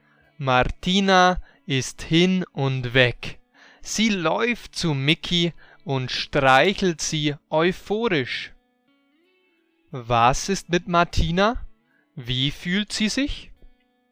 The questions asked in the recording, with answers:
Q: Was ist mit Martina? Wie fühlt sie sich?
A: Sie ist hin und weg.